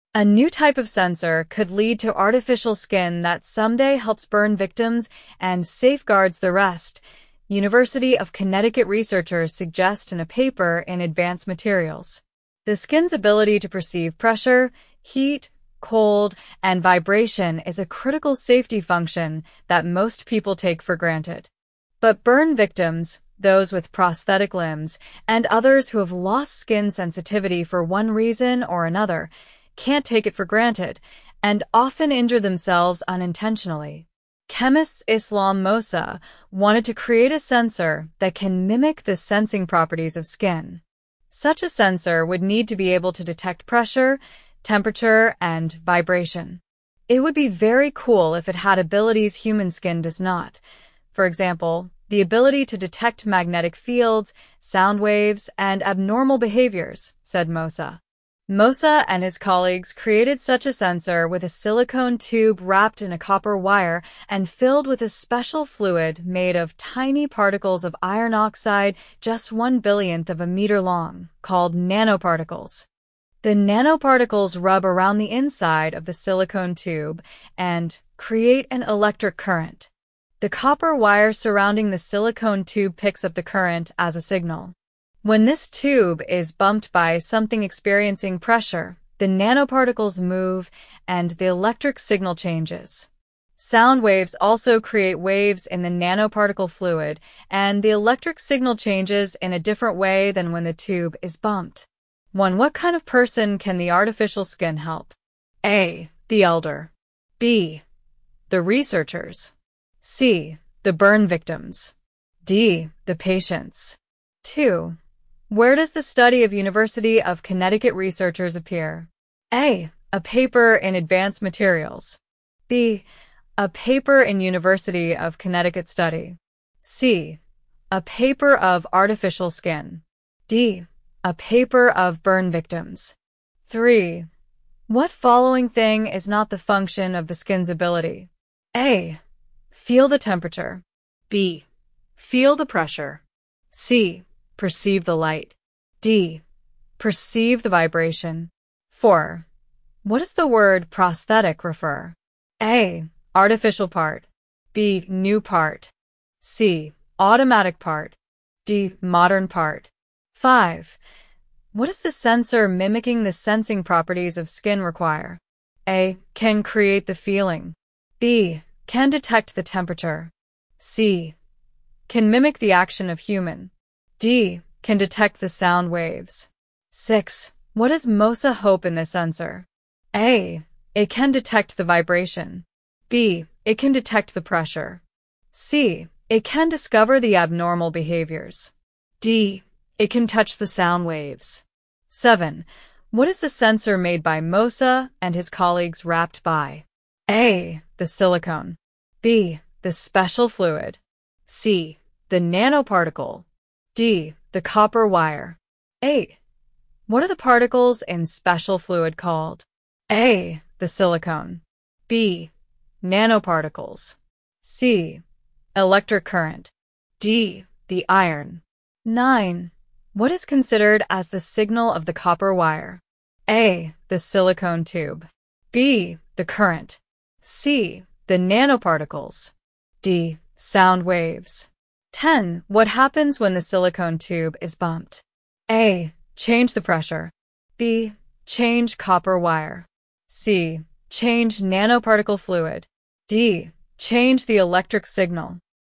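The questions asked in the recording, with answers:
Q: One, what kind of person can the artificial skin help?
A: C: The burn victims.

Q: Where does the study of University of Connecticut researchers appear?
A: A: A paper in Advanced Materials.

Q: What following thing is not the function of the skin's ability?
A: C: Perceive the light.

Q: What does the sensor mimicking the sensing properties of skin require?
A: B: Can detect the temperature.

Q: What does MOSA hope in this sensor?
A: C: It can discover the abnormal behaviors.

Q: What is the sensor made by MOSA and his colleagues wrapped by?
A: D: The copper wire.

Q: What are the particles in special fluid called?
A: B: Nanoparticles.

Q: What is considered as the signal of the copper wire?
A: B: The current.

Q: What happens when the silicone tube is bumped?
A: D: Change the electric signal.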